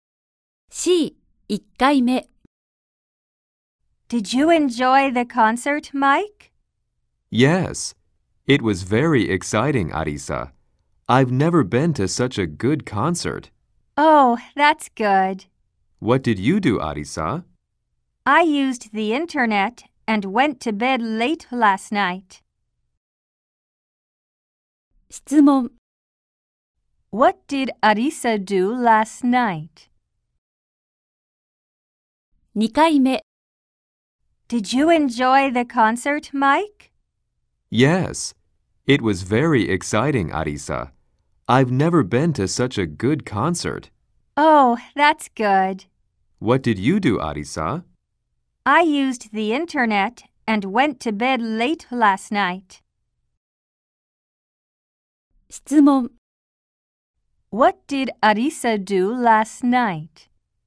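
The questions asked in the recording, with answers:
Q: What did Arisa do last night?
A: She used the internet and went to bed late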